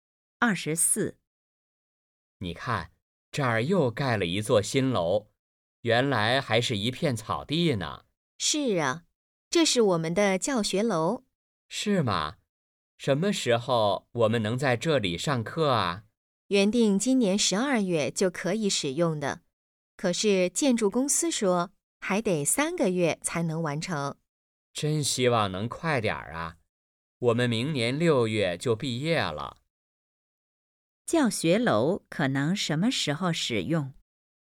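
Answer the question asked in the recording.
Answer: 明年3月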